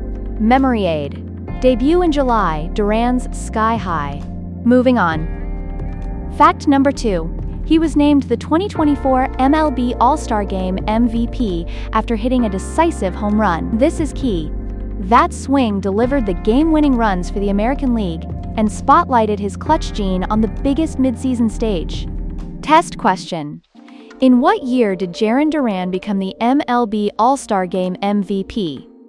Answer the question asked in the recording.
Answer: Correct answer, 2024.